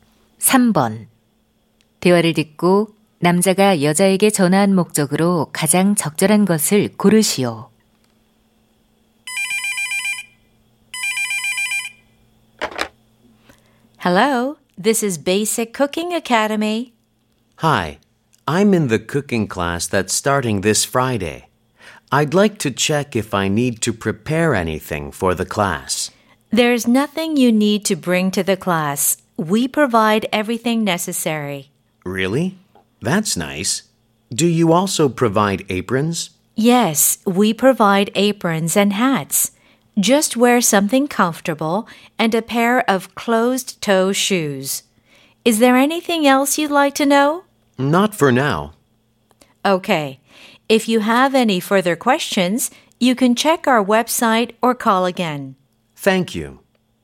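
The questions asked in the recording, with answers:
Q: 대화를 듣고 남자가 여자에게 전화한 목적으로 가장 적절한 것을 고르시오.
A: 수업 준비물을 확인하려고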